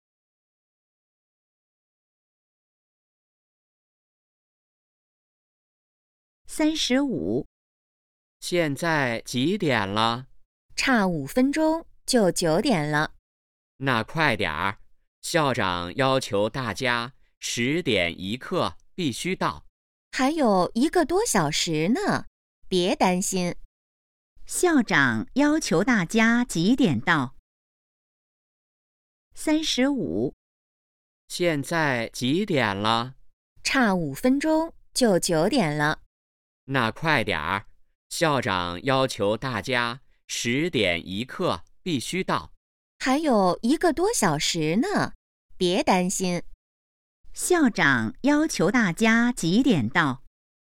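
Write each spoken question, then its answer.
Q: 校长要求大家几点到?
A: 10点1刻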